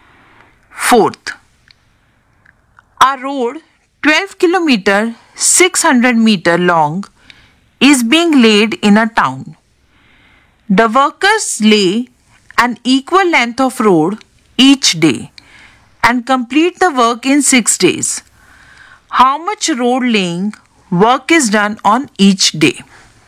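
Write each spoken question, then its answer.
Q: How much road laying work is done on each day?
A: 2 km 100 m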